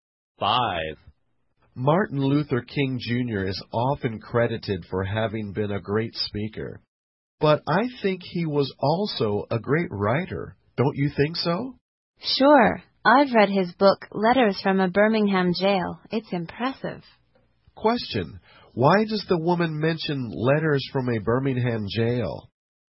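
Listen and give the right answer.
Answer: To agree that King was also a great writer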